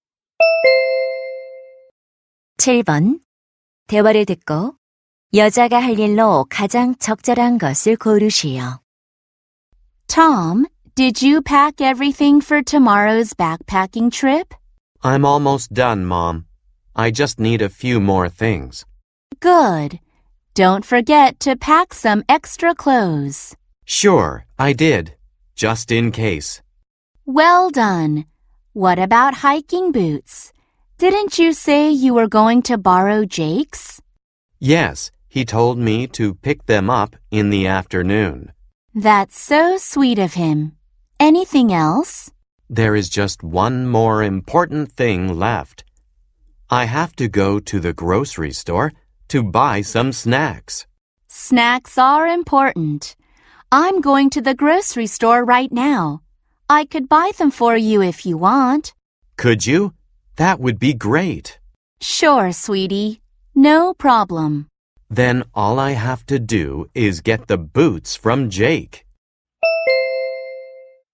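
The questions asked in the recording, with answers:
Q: 대화를 듣고 여자가 할 일로 가장 적절한 것을 고르시오.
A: 간식 사 오기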